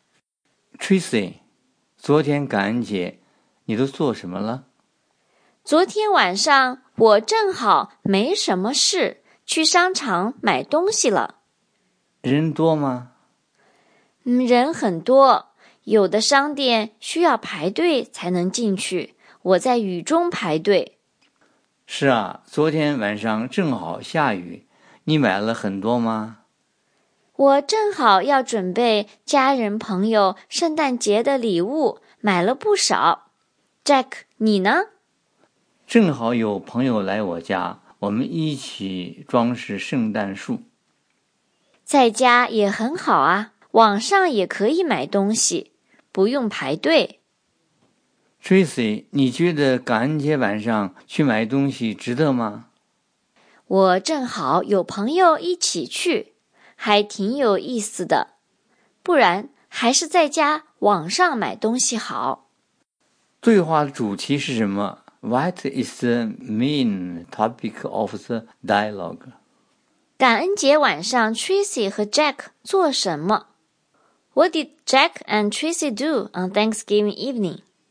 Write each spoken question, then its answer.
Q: 感恩节晚上 Tracy 和 Jack 做什么? What did Jack and Tracy do on Thanksgiving evening?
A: Tracy 和朋友去商场买东西了。杰克和朋友在家装饰圣诞树。